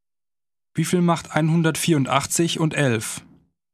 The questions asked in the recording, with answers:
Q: Wie viel macht 184 und 11?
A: 195.